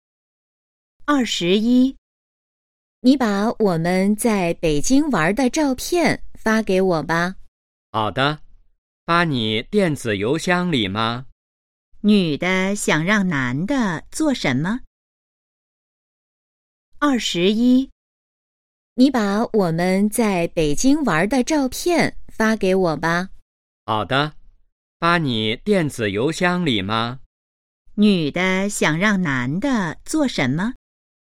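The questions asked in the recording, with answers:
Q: 女的想让男的做什么?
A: 把在北京玩的照片发给她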